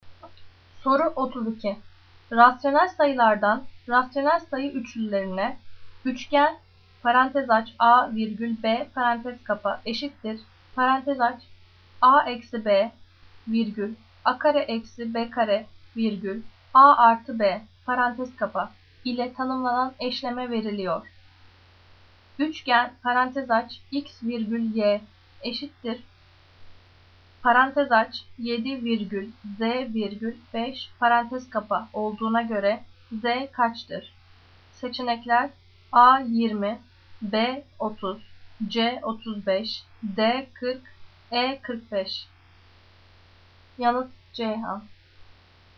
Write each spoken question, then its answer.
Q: Üçgen parantez aç x virgül y eşittir parantez aç 7 virgül z virgül 5 parantez kapa olduğuna göre z kaçtır?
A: Yanıt Ceyhan